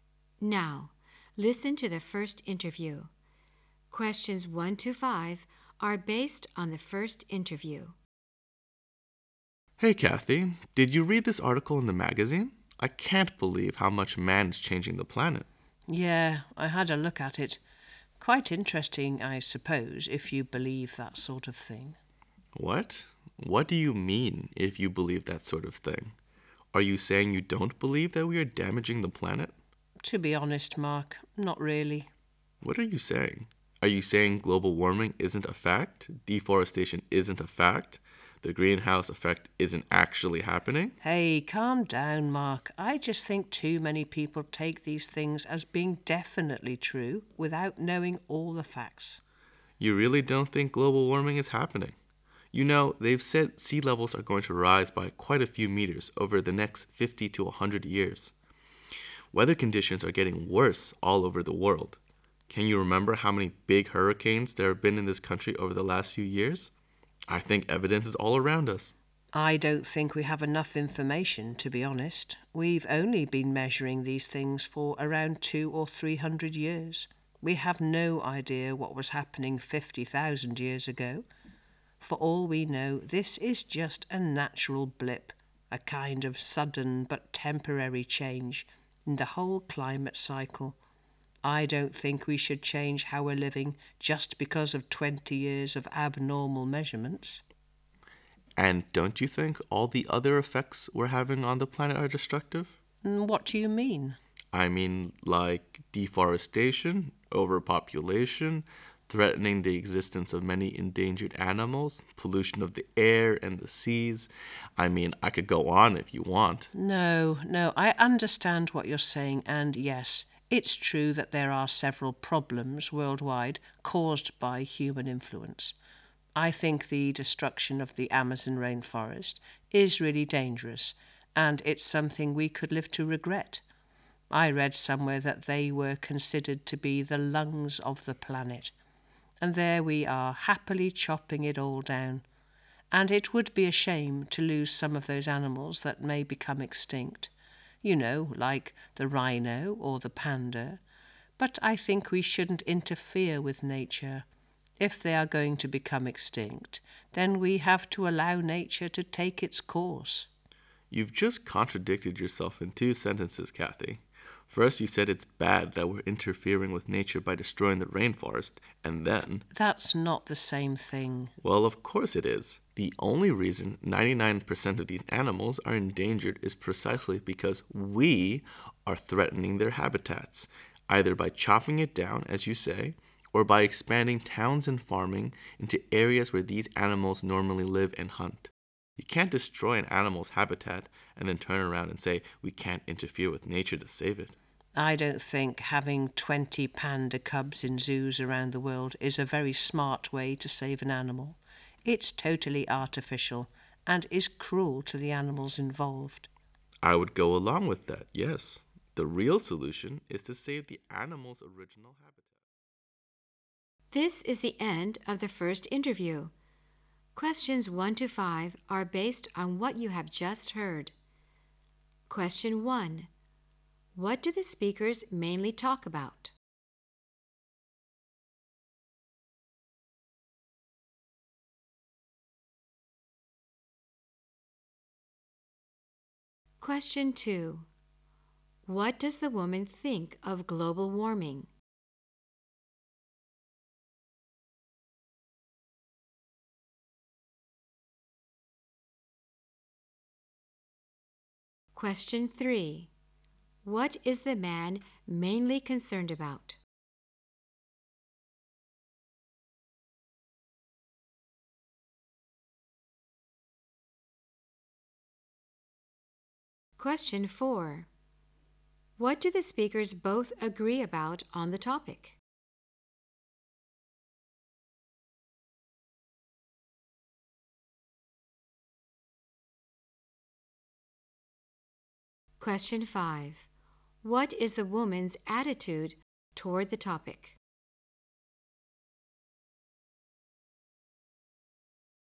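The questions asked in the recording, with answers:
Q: What do the speakers mainly talk about?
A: Human damage to the environment/planet

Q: What does the woman think of global warming?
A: She doubts it; there is not enough information and it may be a natural blip

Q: What do the speakers both agree about on the topic?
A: Keeping pandas in zoos is artificial and cruel and not a smart way to save animals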